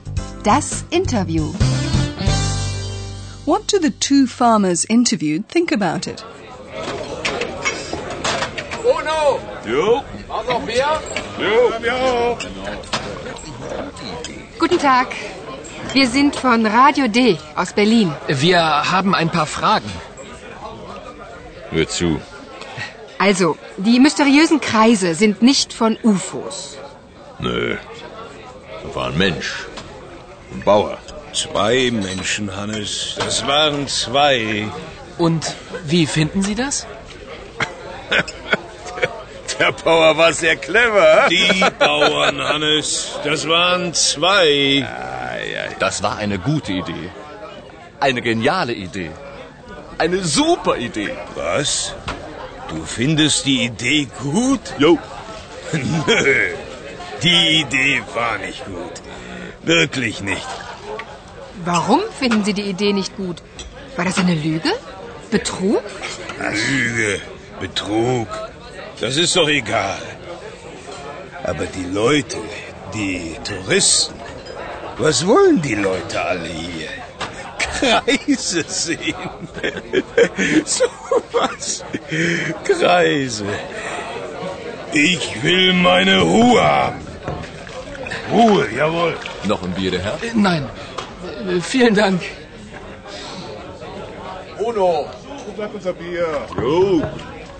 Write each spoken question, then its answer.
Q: What do the two farmers interviewed think about it?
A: Well, you'll probably have gathered that the two farmers from the village hold contrary opinions.